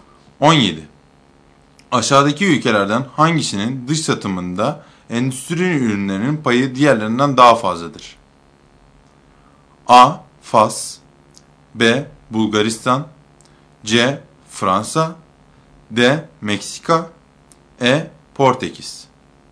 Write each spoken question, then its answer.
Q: Aşağıdaki ülkelerden hangisinin dış satımında endüstri ürünlerinin payı diğerlerinden daha fazladır?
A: Doğru seçenek C şıkkı.